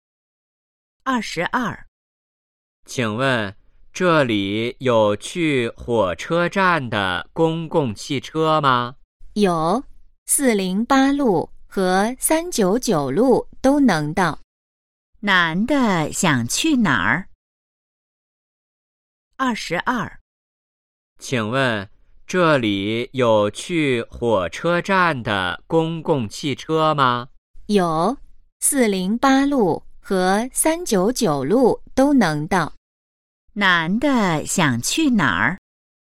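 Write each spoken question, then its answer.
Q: 男的想去哪儿?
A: 火车站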